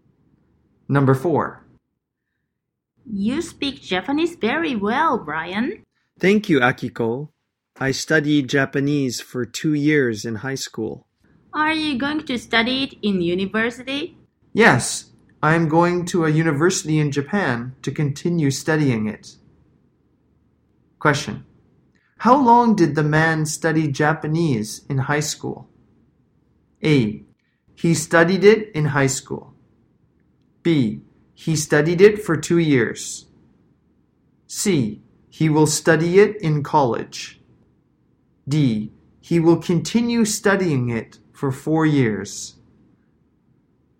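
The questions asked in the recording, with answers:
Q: How long did the man study Japanese in high school?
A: B: He studied it for 2 years.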